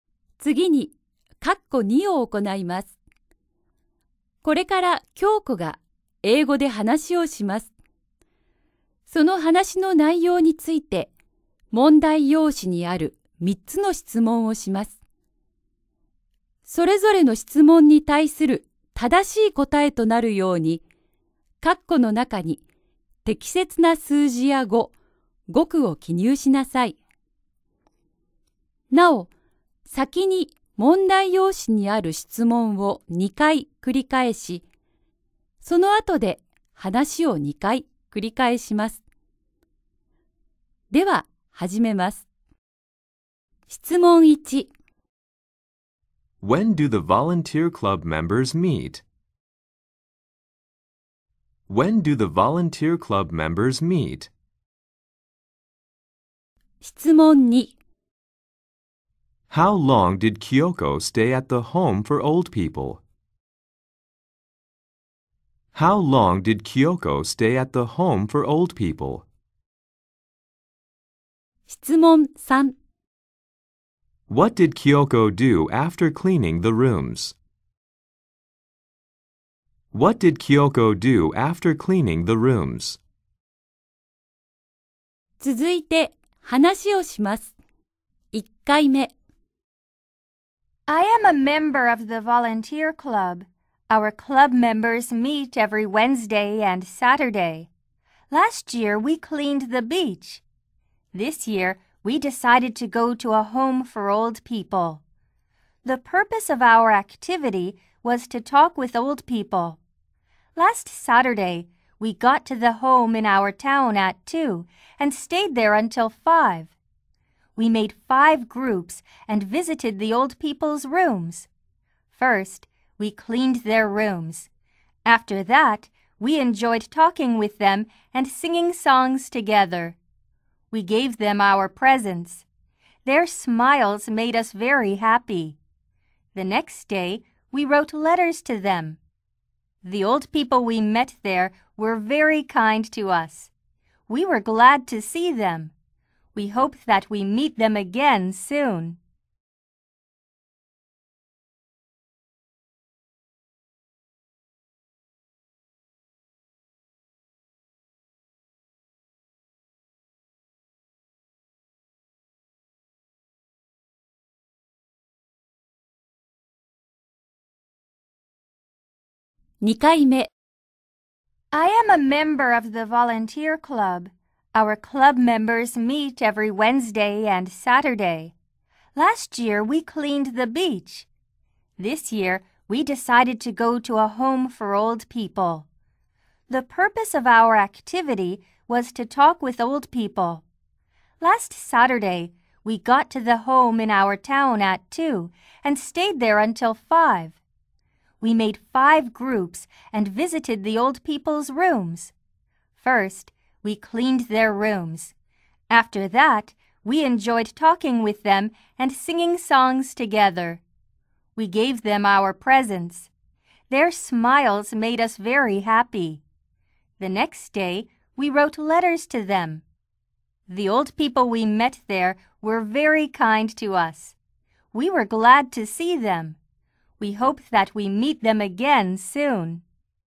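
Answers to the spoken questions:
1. Every Wednesday and Saturday
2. For three hours
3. She enjoyed talking with them and singing songs together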